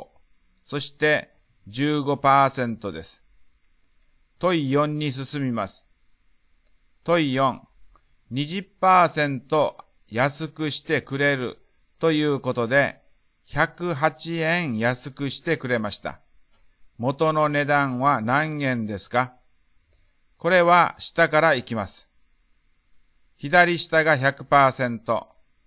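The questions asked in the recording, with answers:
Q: 20% 安くしてくれるということで、108円安くしてくれました。 元の値段は何円ですか?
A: 540円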